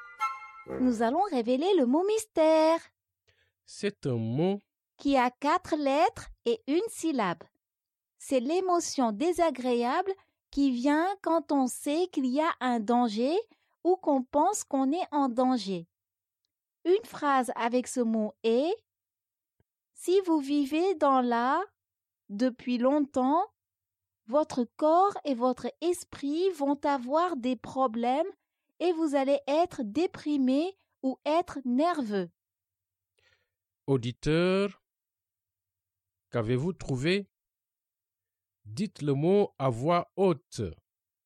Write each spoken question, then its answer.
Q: Auditeur, qu'avez-vous trouvé?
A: Le mot mystère est « peur ».